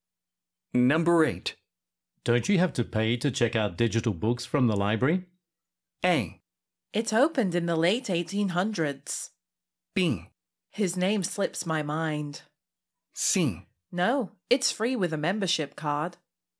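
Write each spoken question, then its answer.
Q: Don't you have to pay to check out digital books from the library?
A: C: No, it's free with a membership card.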